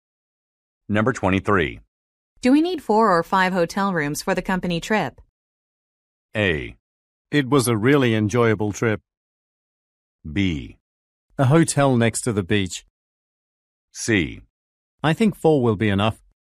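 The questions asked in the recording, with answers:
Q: Do we need 4 or 5 hotel rooms for the company trip?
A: C: I think 4 will be enough.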